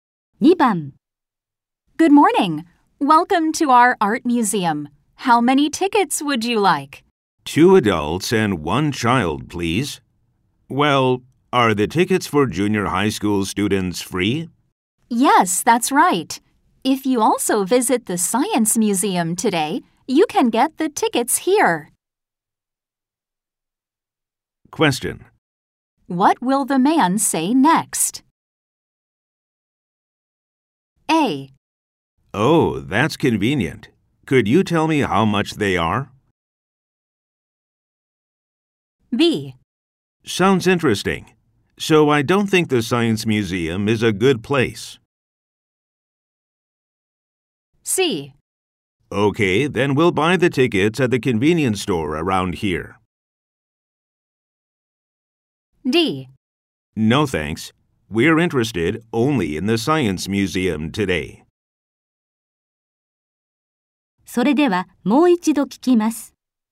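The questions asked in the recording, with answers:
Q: What will the man say next?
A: A: Oh, that's convenient. Could you tell me how much they are?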